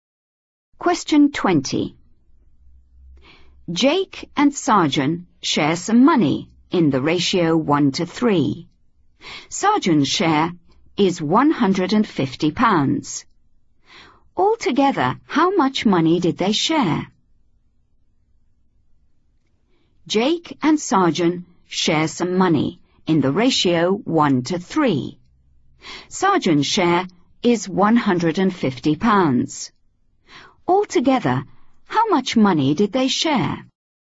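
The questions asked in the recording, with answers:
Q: Sarjan's share is £150. Altogether, how much money did they share?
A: £200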